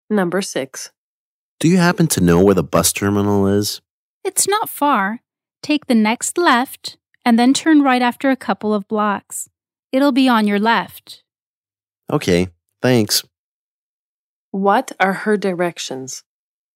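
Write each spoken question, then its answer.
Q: What are her directions?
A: Take the next left, then turn right after a couple of blocks; it's on the left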